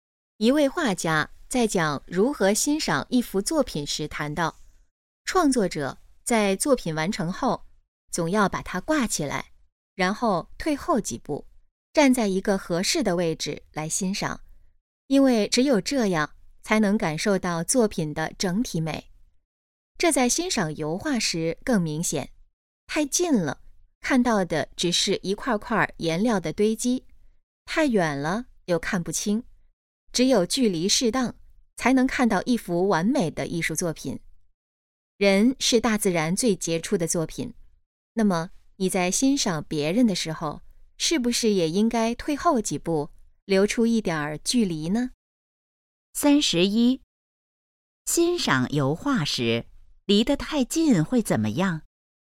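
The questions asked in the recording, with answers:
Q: 欣赏油画时离得太近会怎么样?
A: 只看到一块块颜料的堆积

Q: 这段话主要想告诉我们什么?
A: 欣赏别人时要保持一点距离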